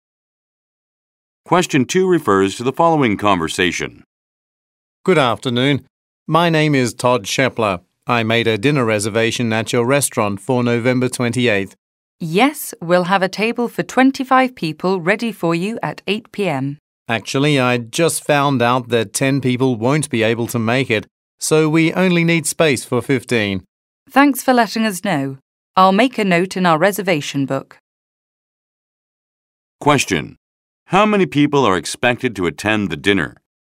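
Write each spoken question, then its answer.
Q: How many people are expected to attend the dinner?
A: 15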